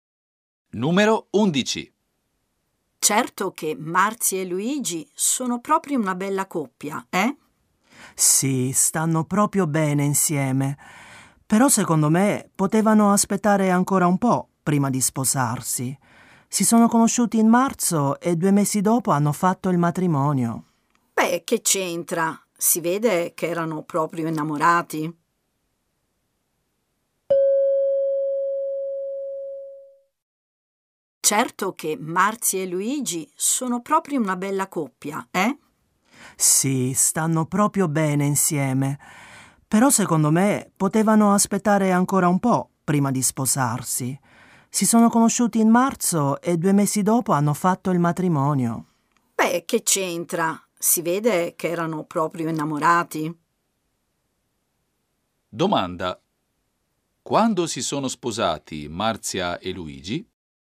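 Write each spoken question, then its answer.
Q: Domanda. Quando si sono sposati Marzia e Luigi?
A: A maggio, due mesi dopo essersi conosciuti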